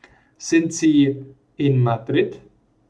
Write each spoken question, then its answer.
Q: Sind Sie in Madrid?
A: Nein, Sie sind nicht in Madrid, sondern in Paris.